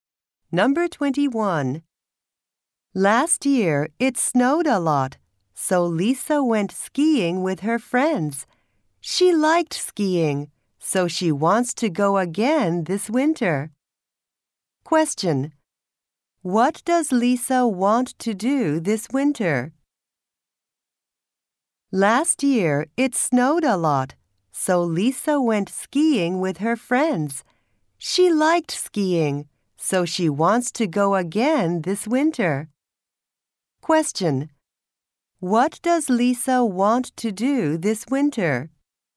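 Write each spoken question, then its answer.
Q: What does Lisa want to do this winter?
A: Go skiing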